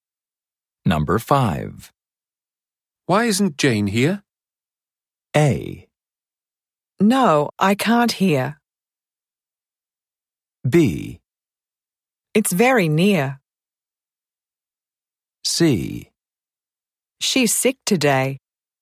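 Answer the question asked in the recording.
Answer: C: She's sick today.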